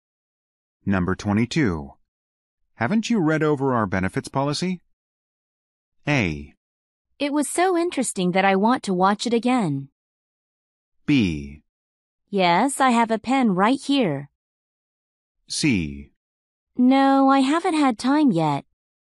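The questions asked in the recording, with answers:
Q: Haven't you read over our benefits policy?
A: C: No, I haven't had time yet.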